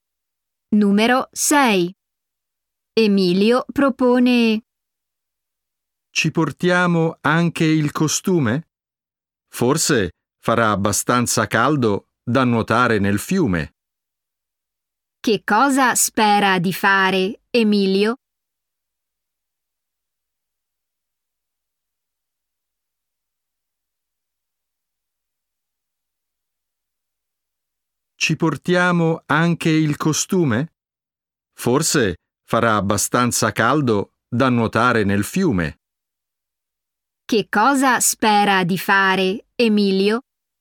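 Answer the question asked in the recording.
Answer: Nuotare nel fiume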